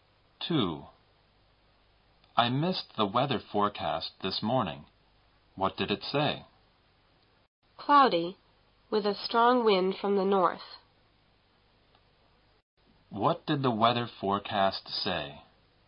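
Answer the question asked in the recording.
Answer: Cloudy, with a strong wind from the north.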